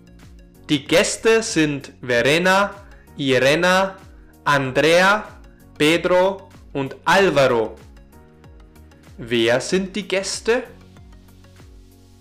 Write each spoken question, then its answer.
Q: Wer sind die Gäste?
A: Die Gäste sind Verena, Irena, Andrea, Pedro und Alvaro.